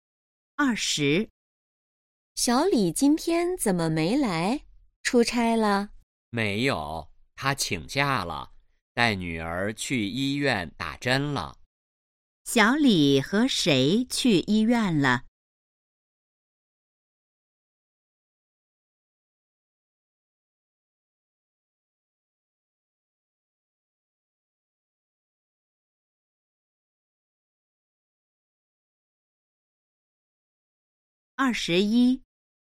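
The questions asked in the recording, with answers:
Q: 小李和谁去医院了?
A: 女儿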